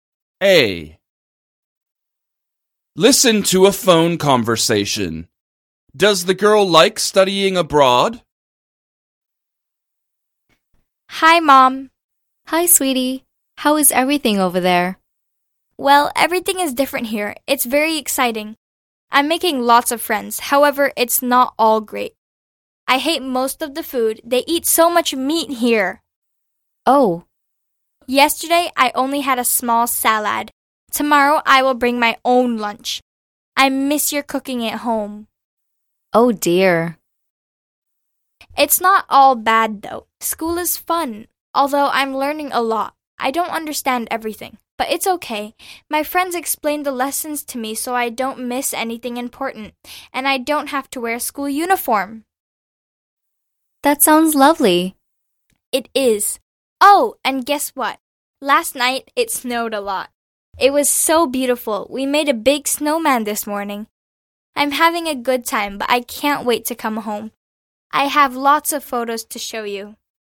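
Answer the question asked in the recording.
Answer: Yes, mostly. She is having a good time, although she dislikes the food.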